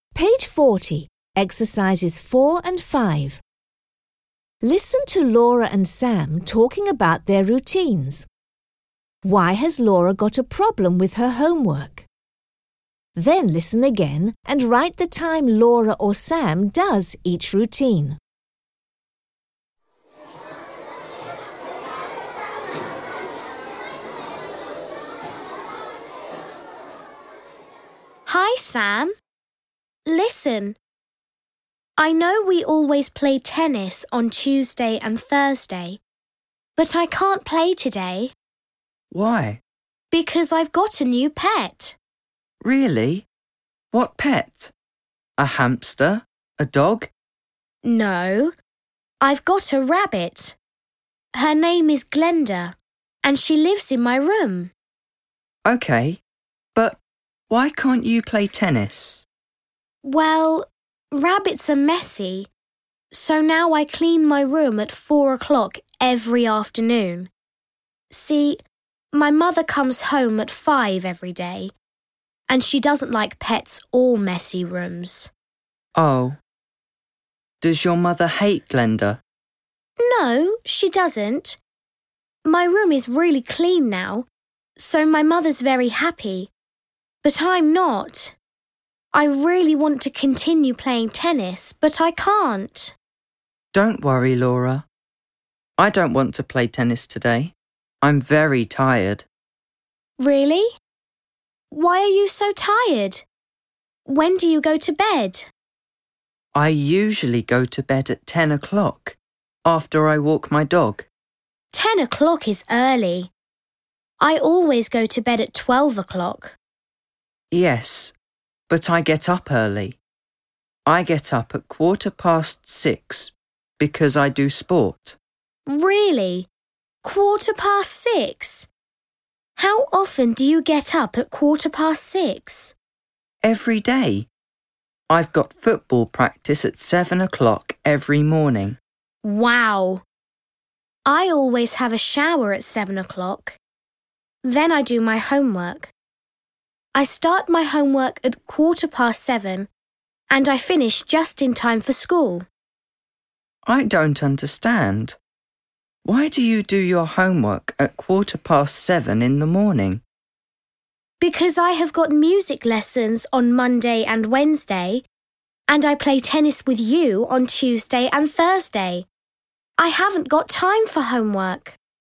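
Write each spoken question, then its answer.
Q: Why has Laura got a problem with her homework?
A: She has no time after school (music lessons and tennis), so she does it at 7:15 in the morning before school.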